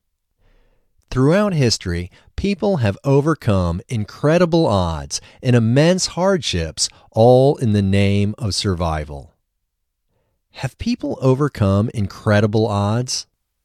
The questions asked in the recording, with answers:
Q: Have people overcome incredible odds?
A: Yes, people have overcome incredible odds.